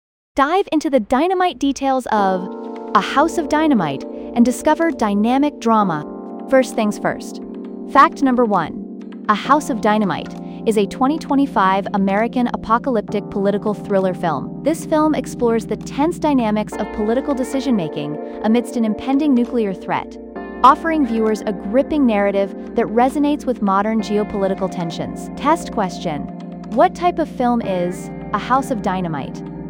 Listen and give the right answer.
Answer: Apocalyptic political thriller.